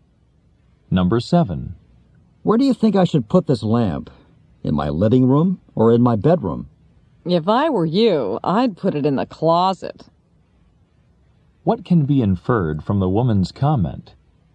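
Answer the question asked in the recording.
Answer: She thinks the lamp is ugly.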